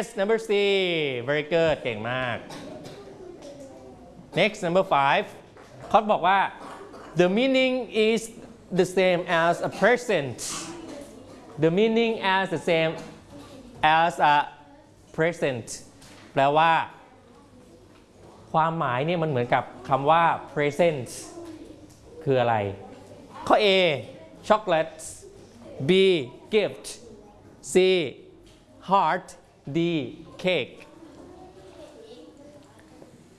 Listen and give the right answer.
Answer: Yes, it's a gift. Has the same meaning as a present.